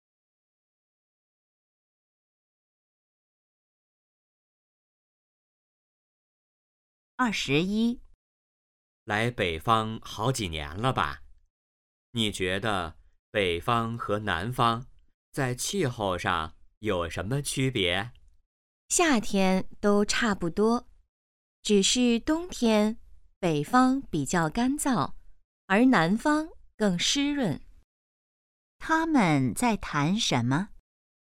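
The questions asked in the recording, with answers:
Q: 他们在谈什么?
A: 北方和南方的气候区别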